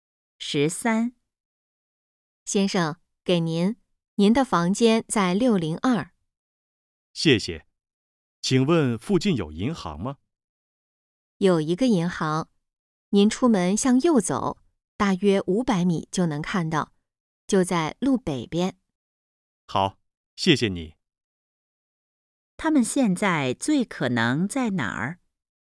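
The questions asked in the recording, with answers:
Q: 他们现在最可能在哪儿?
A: 宾馆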